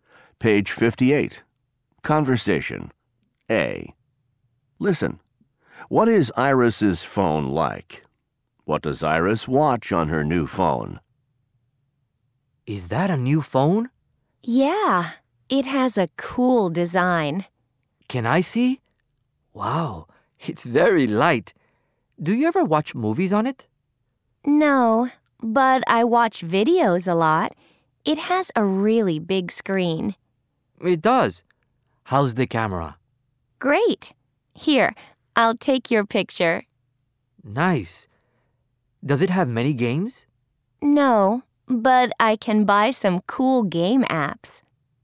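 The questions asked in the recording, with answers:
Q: What is Iris's phone like?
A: It has a cool design, it's very light, has a really big screen and a great camera.

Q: What does Iris watch on her new phone?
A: Videos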